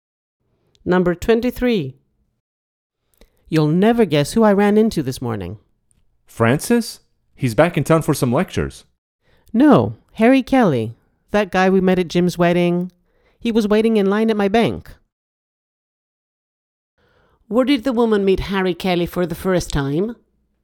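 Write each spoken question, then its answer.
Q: Where did the woman meet Harry Kelly for the first time?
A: At Jim's wedding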